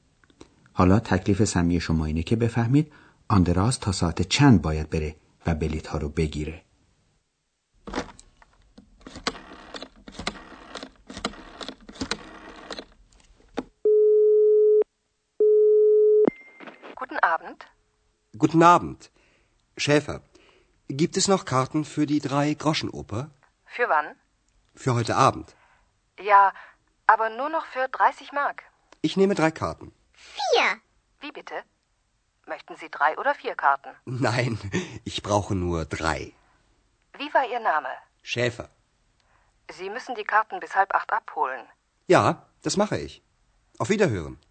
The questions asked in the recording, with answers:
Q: حالا تکلیف سمی شما اینه که بفهمید آندراز تا ساعت چند باید بره و بلیت ها رو بگیره.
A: پس آندراس حداکثر تا ساعت هفت و نیم باید بره و بلیت ها رو بگیره.